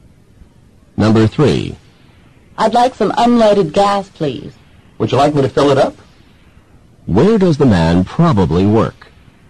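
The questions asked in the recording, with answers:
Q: Where does the man probably work?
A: At a gas station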